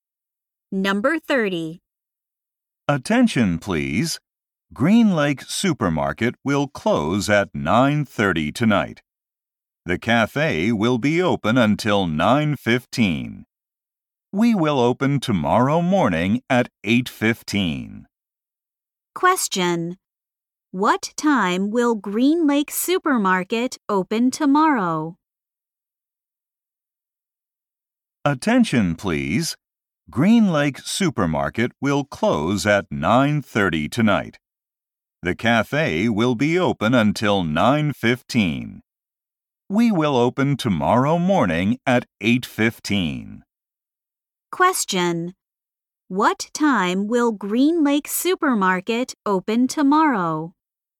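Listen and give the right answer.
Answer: At 8:15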